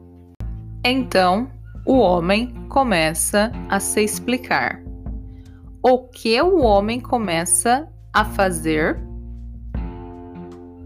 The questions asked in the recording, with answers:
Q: O que o homem começa a fazer?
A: Ele começa a se explicar